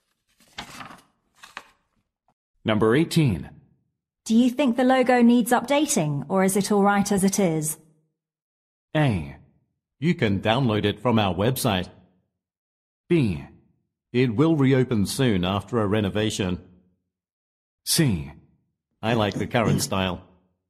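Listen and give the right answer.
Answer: C: I like the current style.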